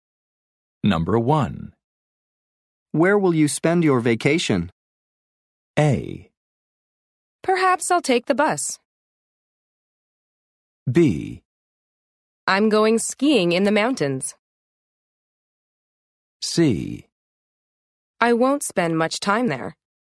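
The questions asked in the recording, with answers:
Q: Where will you spend your vacation?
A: B: I'm going skiing in the mountains.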